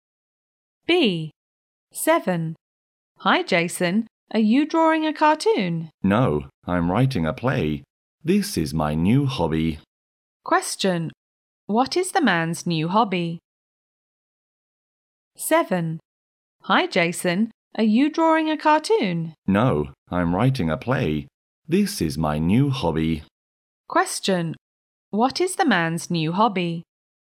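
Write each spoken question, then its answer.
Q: What is the man's new hobby?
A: Writing a play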